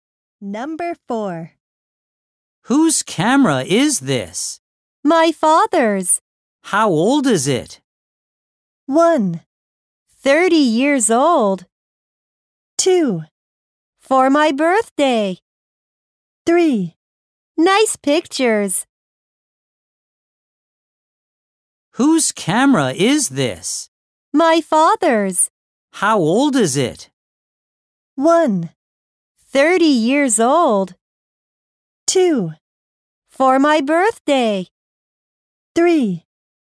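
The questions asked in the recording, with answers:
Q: How old is it?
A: 1: 30 years old.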